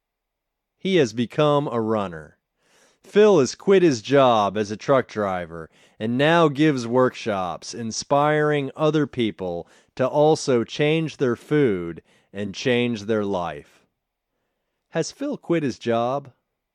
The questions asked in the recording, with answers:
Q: Has Phil quit his job?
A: Yes, Phil has quit his job.